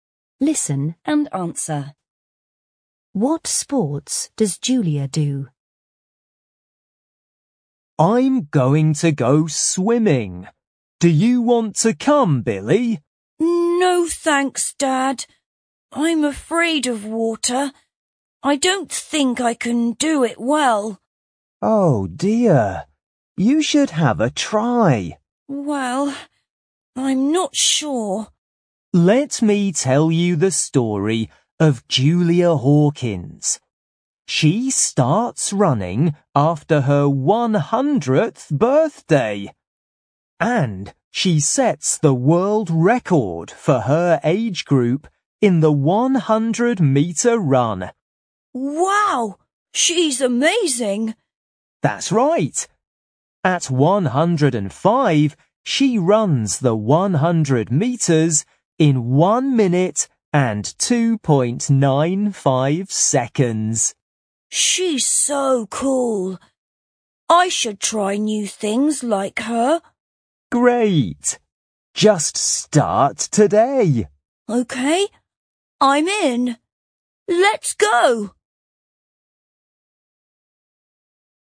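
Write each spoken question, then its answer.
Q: What sports does Julia do?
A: Running (the 100-meter run)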